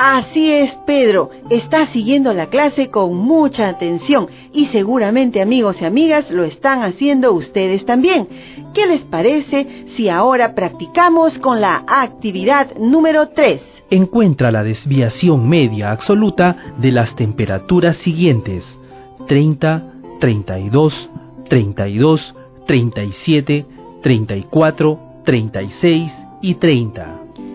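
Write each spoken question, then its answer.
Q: Encuentra la desviación media absoluta de las temperaturas siguientes: 30, 32, 32, 37, 34, 36 y 30.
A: 16/7 ≈ 2,29 grados (media = 33)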